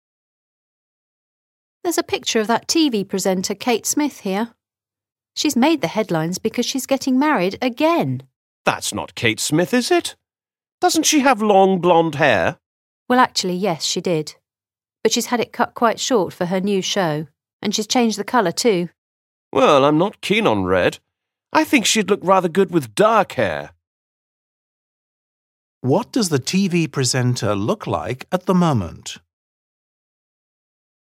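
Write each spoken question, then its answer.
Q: What does the TV presenter look like at the moment?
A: short red hair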